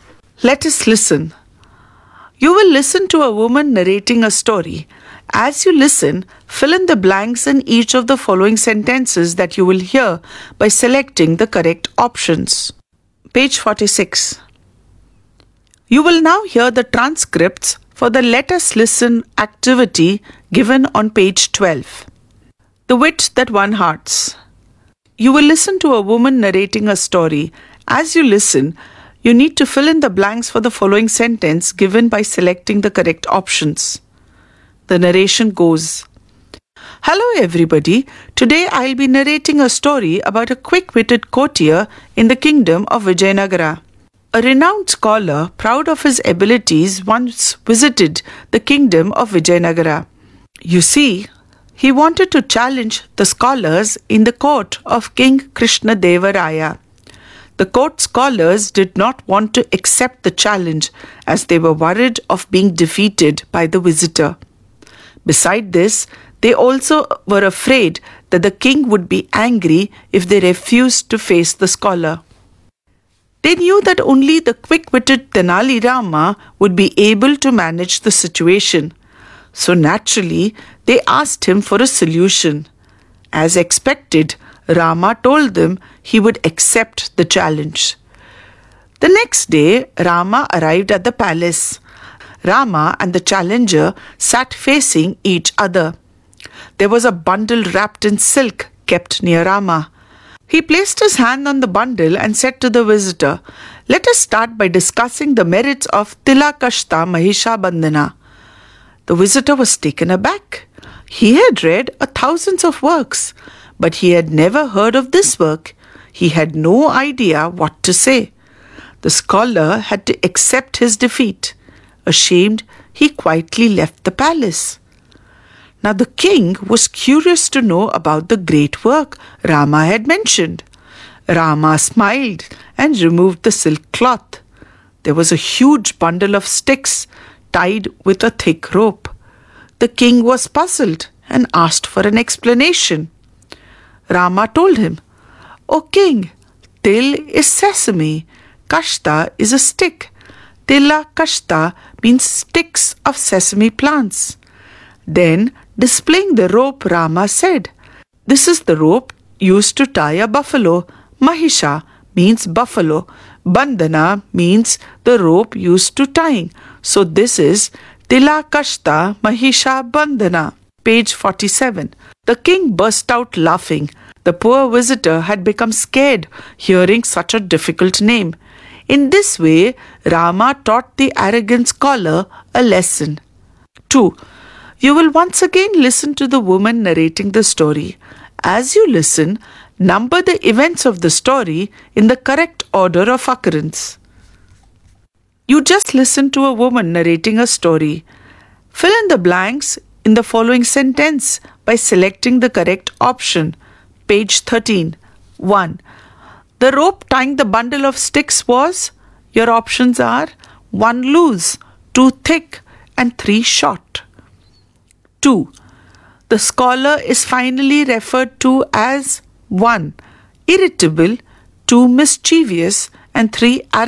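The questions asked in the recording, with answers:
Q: The rope tying the bundle of sticks was?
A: 2: Thick

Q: The scholar is finally referred to as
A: 3: Arrogant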